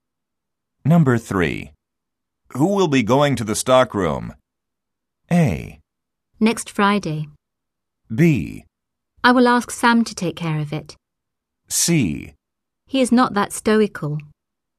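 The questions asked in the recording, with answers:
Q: Who will be going to the stockroom?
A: B: I will ask Sam to take care of it.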